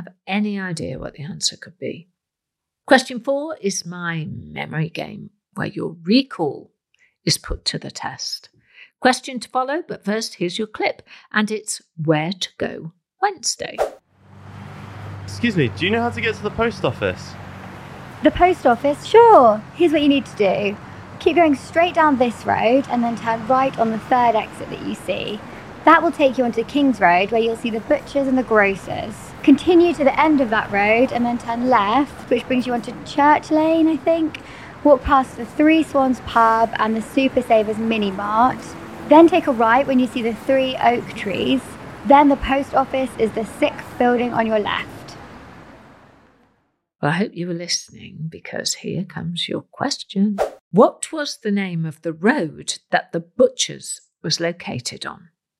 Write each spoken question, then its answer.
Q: What was the name of the road that the butcher's was located on?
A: The answer was King's Road.